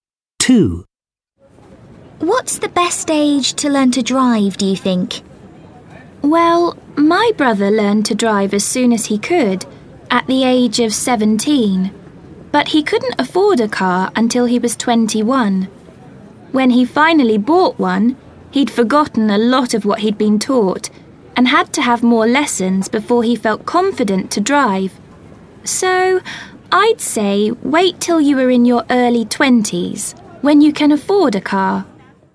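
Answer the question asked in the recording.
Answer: In your early 20s, when you can afford a car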